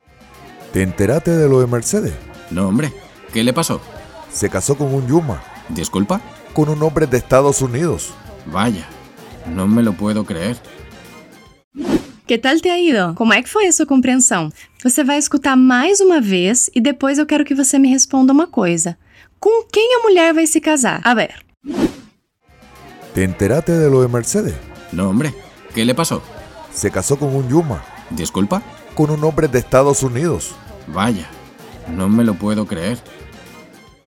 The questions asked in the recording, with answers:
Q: con quién la mujer va a se casar?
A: Ela vai se casar com um Yuma.